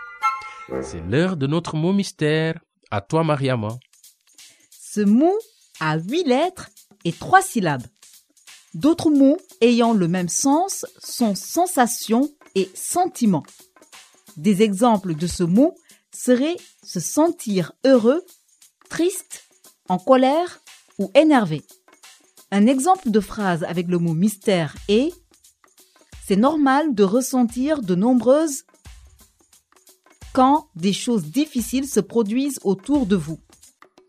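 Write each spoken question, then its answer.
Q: C'est l'heure de notre mot mystère.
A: émotions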